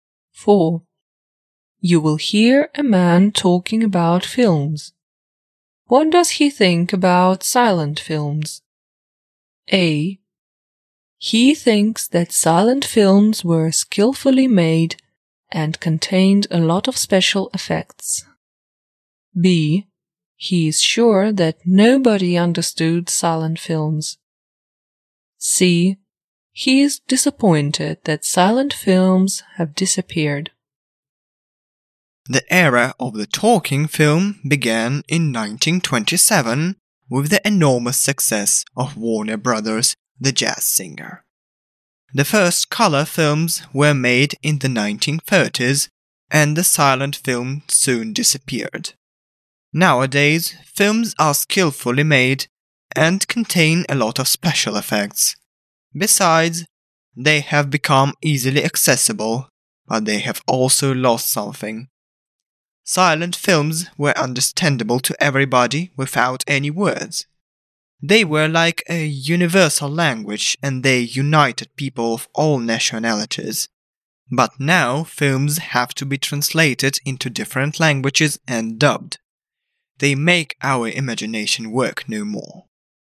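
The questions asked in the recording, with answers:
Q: What does he think about silent films?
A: C: He is disappointed that silent films have disappeared.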